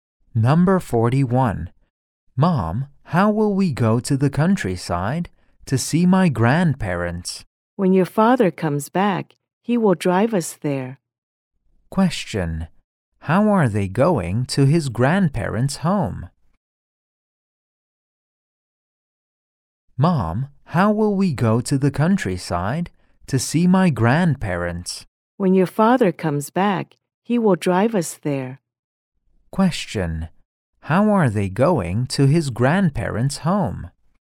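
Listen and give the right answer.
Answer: By car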